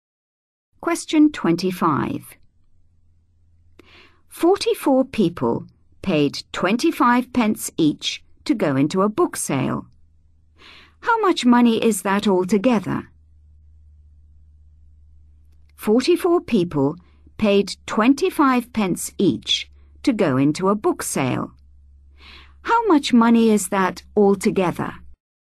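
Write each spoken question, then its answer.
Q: How much money is that altogether?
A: £11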